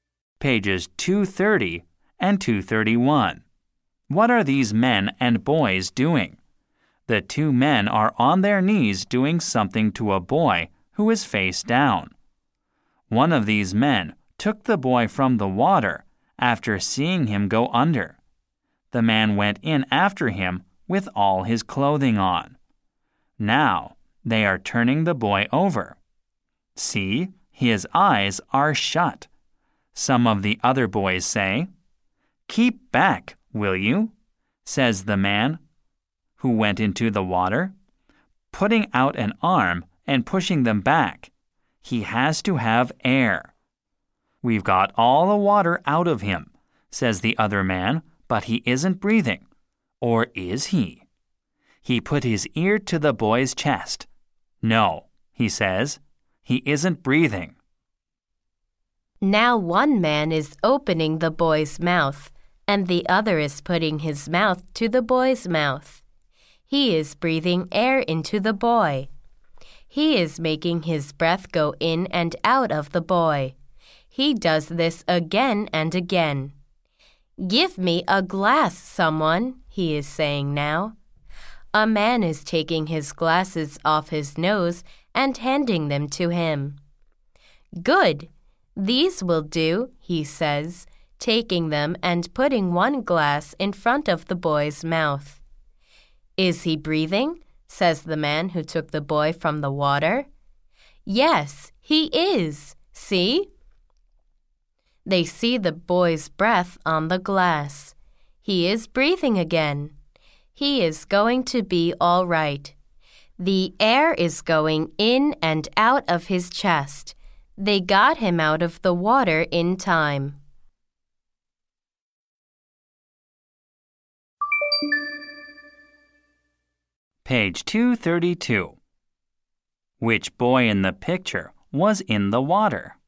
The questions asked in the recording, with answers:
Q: Which boy in the picture was in the water?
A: The boy who is face down in the picture was in the water.